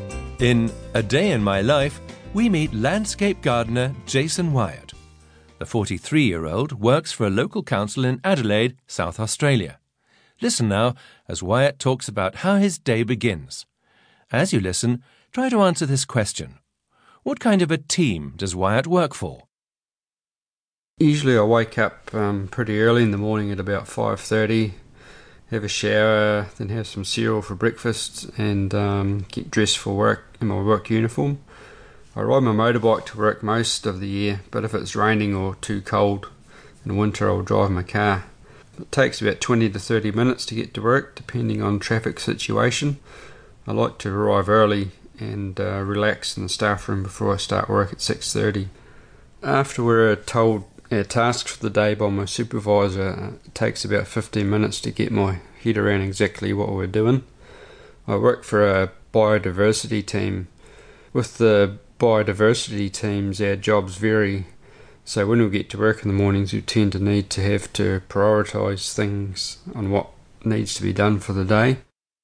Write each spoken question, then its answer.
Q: What kind of a team does Wyatt work for?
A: He works for a biodiversity team.